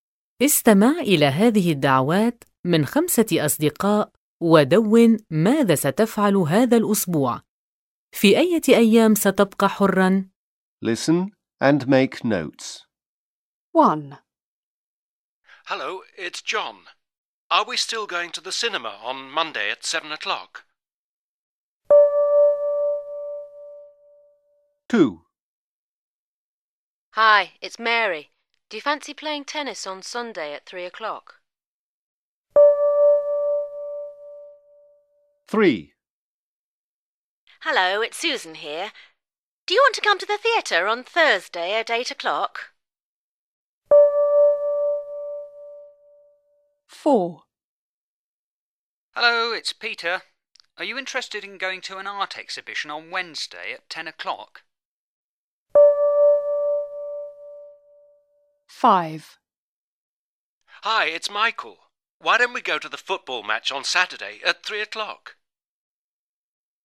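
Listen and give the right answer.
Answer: الثلاثاء والجمعة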